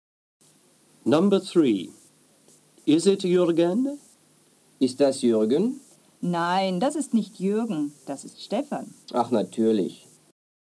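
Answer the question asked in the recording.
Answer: No, it is Stefan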